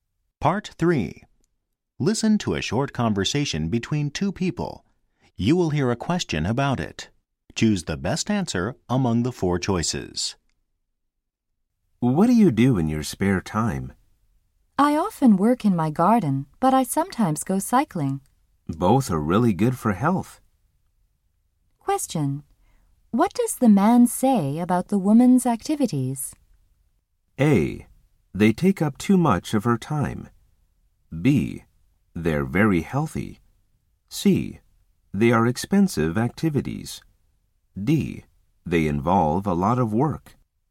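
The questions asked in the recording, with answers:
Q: Question. What does the man say about the woman's activities?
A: B: They're very healthy.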